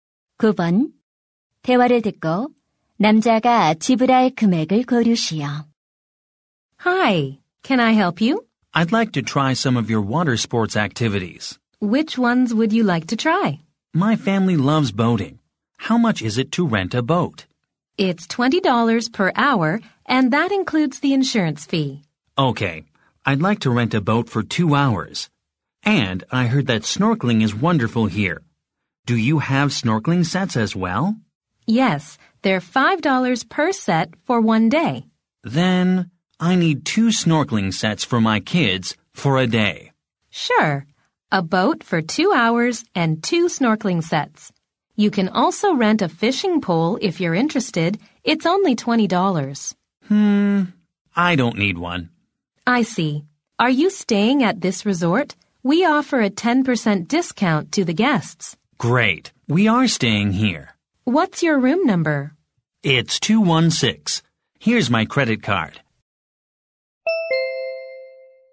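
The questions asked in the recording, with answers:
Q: 대화를 듣고 남자가 지불할 금액을 고르시오.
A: $45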